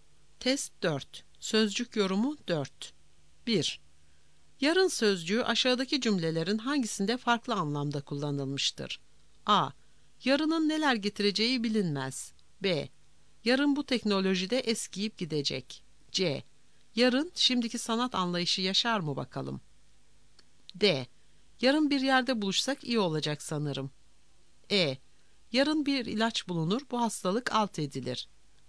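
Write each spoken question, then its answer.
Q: Yarın sözcüğü aşağıdaki cümlelerin hangisinde farklı anlamda kullanılmıştır?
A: D: Yarın bir yerde buluşsak iyi olacak sanırım.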